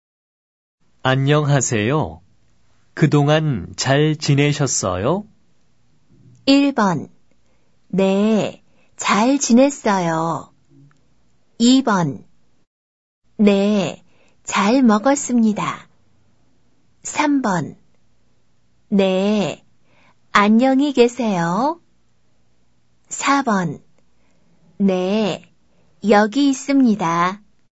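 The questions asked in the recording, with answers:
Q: 안녕하세요. 그동안 잘 지내셨어요?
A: 1: 네, 잘 지냈어요.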